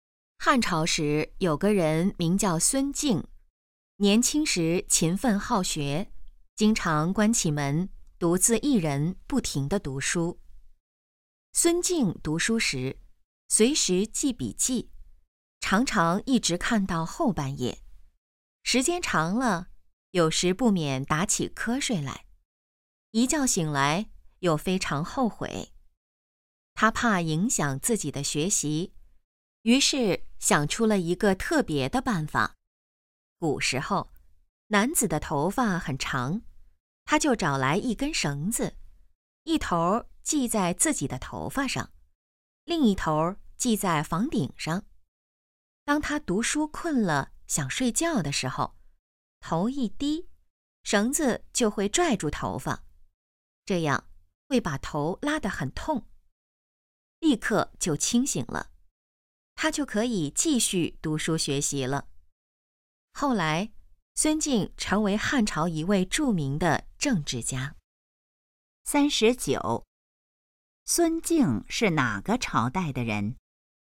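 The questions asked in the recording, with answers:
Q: 孙敬是哪个朝代的人?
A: 汉朝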